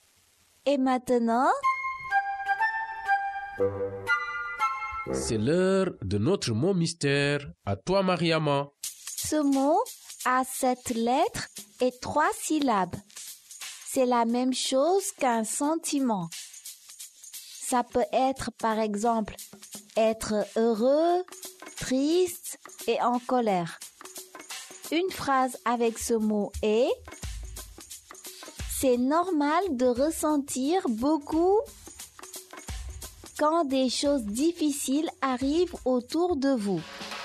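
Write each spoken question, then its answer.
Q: Ce mot a 7 lettres et 3 syllabes.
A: émotion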